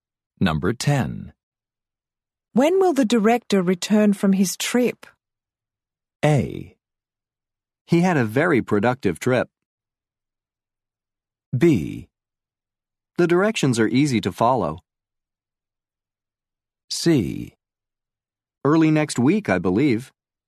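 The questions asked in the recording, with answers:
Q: When will the director return from his trip?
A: C: Early next week, I believe.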